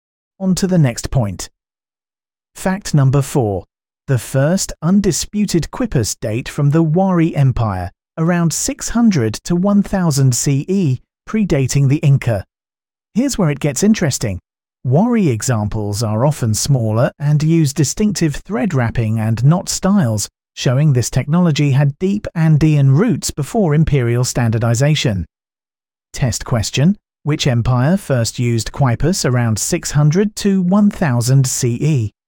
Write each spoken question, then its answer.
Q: Which empire first used quipus around 600 to 1000 CE?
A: Correct answer. Wari Empire.